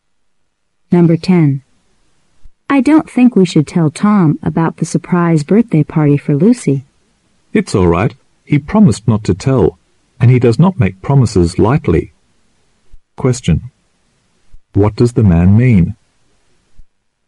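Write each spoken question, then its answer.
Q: What does the man mean?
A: Tom can be trusted to keep the secret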